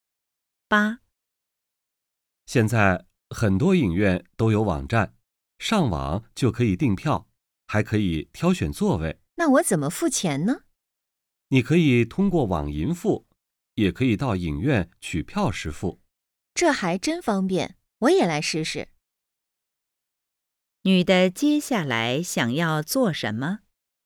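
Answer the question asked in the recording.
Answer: 上网订电影票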